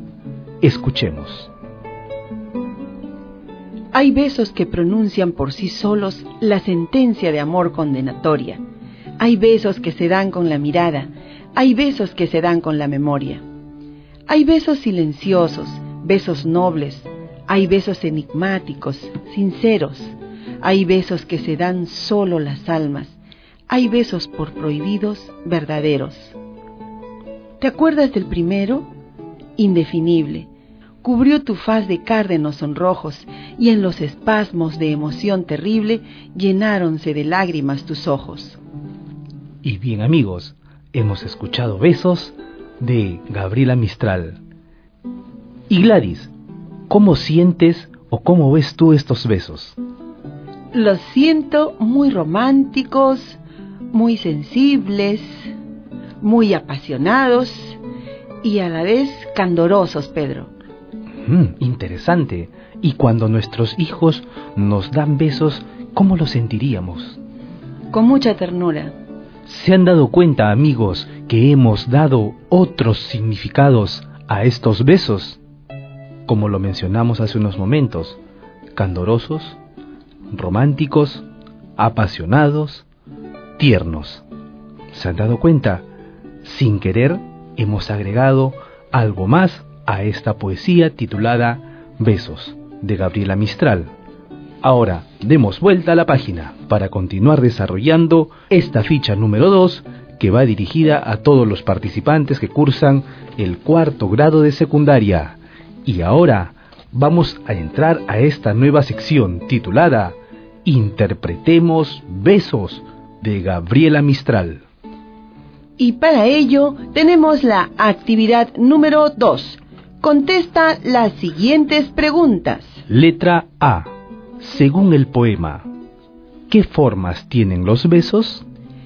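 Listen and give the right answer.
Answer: Besos que se dan con la mirada, con la memoria, silenciosos, nobles, enigmáticos, sinceros, los que solo se dan las almas y los prohibidos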